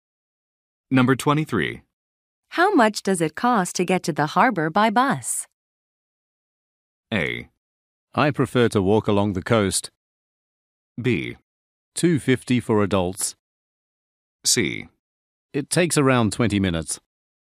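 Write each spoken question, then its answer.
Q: How much does it cost to get to the harbor by bus?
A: B: $2.50 for adults.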